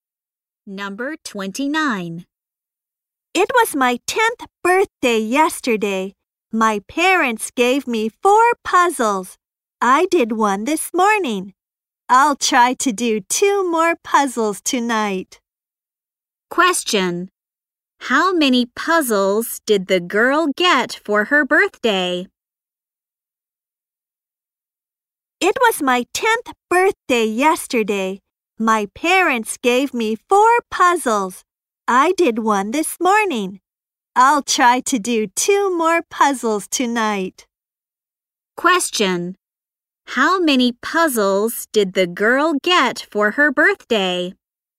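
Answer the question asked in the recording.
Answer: Four.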